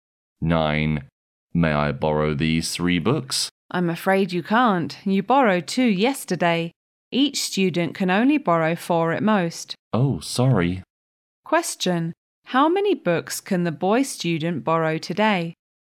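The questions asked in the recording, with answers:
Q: How many books can the boy student borrow today?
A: Two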